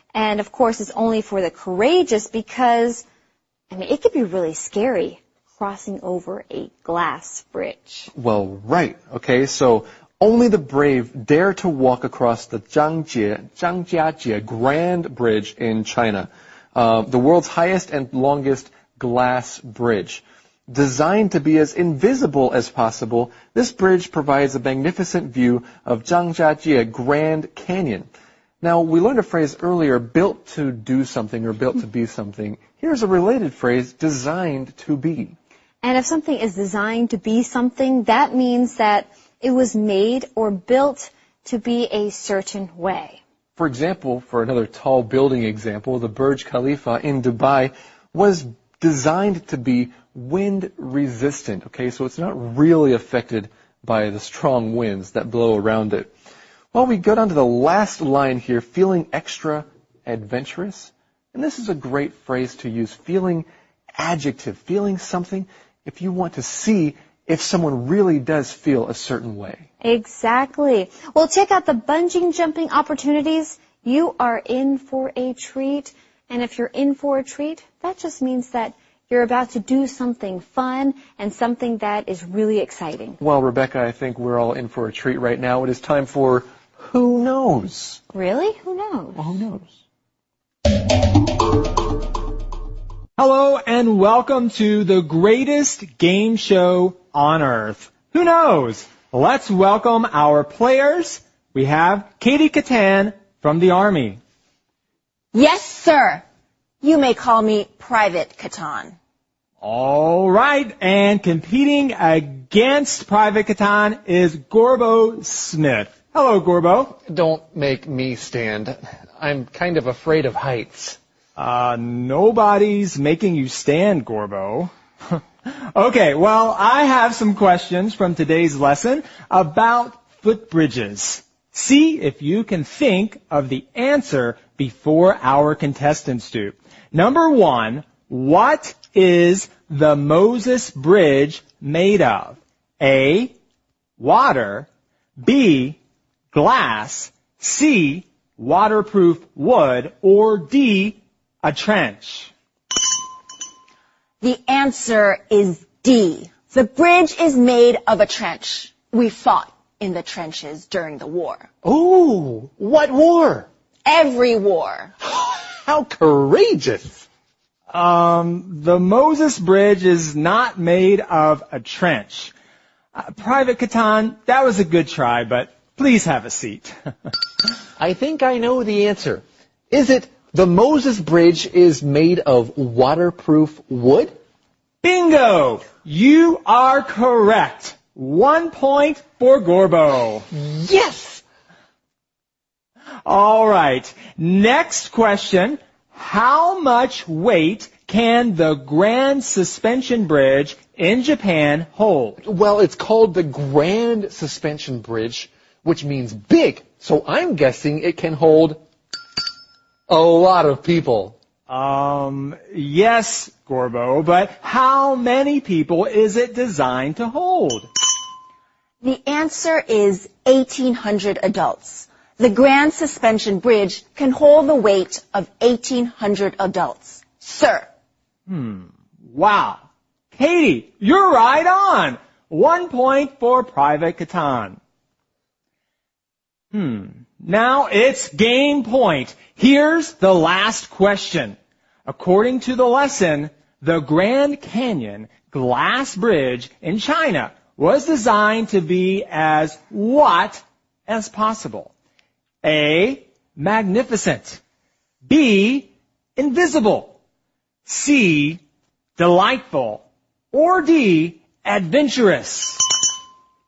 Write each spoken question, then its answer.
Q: According to the lesson, the Grand Canyon Glass Bridge in China was designed to be as what as possible?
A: This bridge was designed to be as invisible as possible.